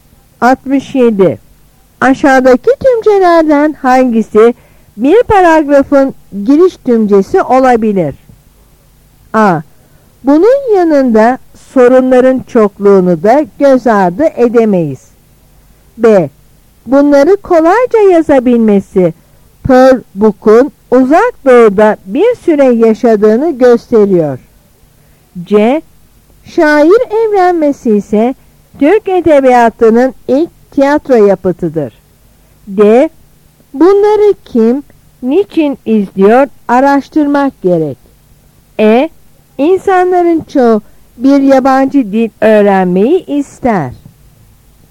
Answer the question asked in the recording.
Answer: Yanıt E.